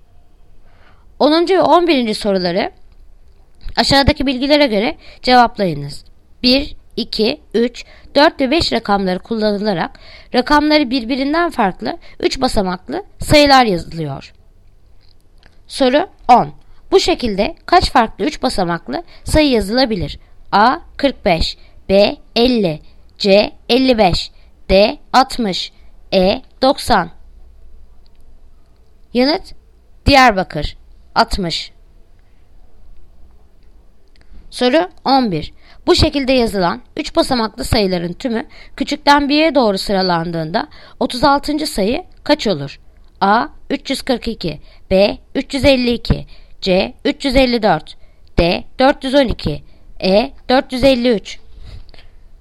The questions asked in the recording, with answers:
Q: Bu şekilde kaç farklı 3 basamaklı sayı yazılabilir?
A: Yanıt Diyarbakır 60.

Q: Bu şekilde yazılan 3 basamaklı sayıların tümü küçükten 1'ye doğru sıralandığında 36.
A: Yanıt Ceyhan 354.